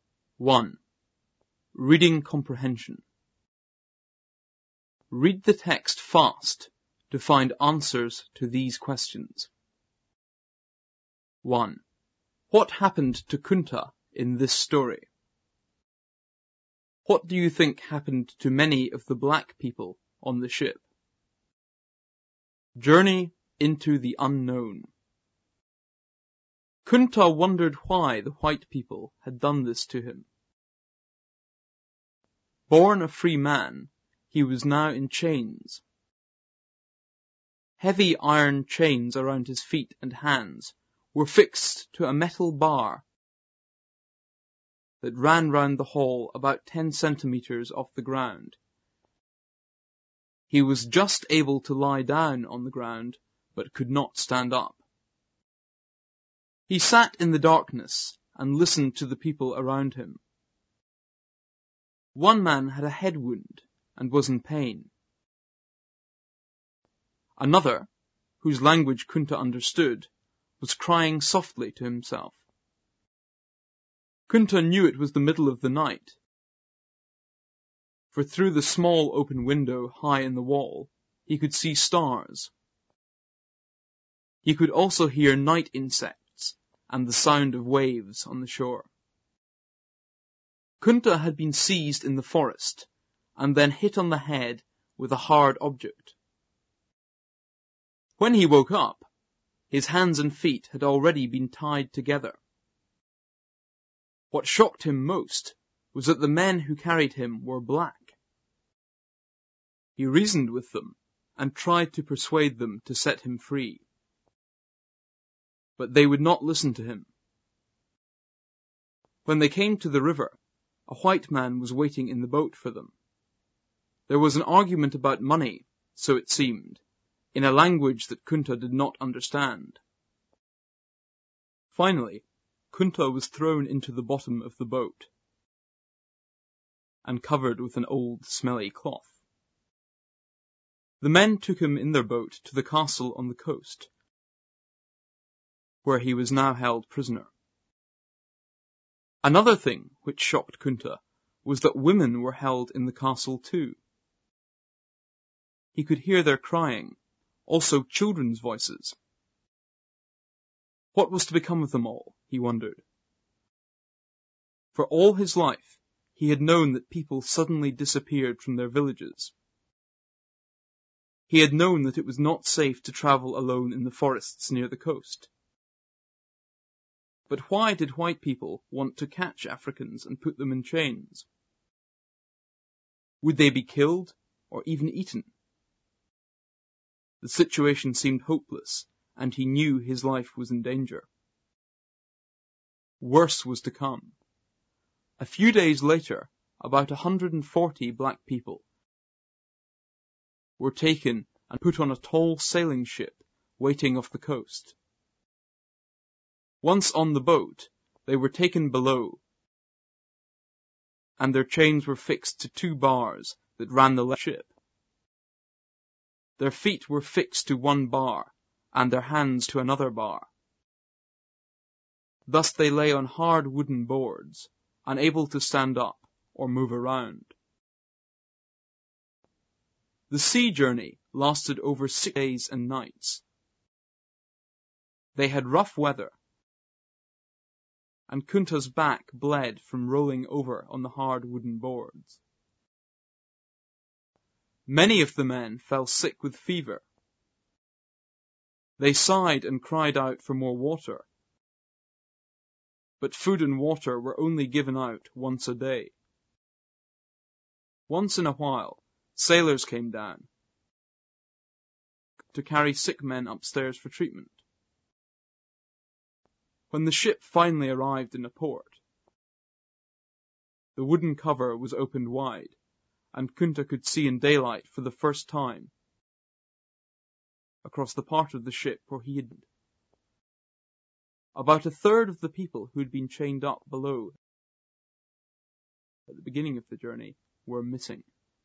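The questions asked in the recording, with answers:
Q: What happened to Kunta in this story?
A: He was captured, put in chains and taken away by ship as a prisoner (a slave).

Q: What do you think happened to many of the black people on the ship?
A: They died on the journey; about a third of them were missing.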